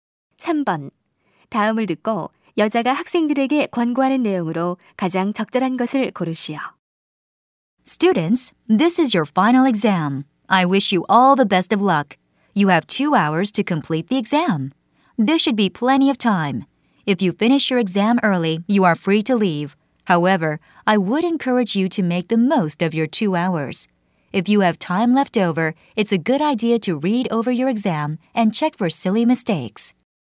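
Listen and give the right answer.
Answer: 시간이 남으면 시험지를 다시 검토하여 실수를 확인하라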